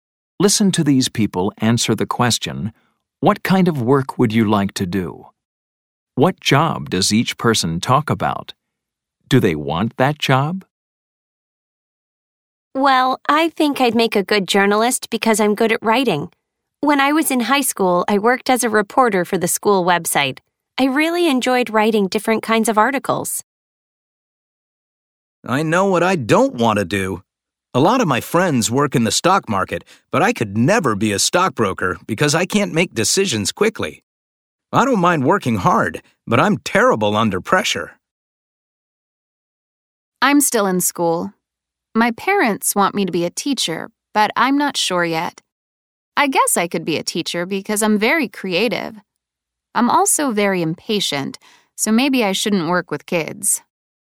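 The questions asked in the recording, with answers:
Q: What job does each person talk about?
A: Speaker 1: journalist; Speaker 2: stockbroker; Speaker 3: teacher

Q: Do they want that job?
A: Speaker 1: yes; Speaker 2: no; Speaker 3: not sure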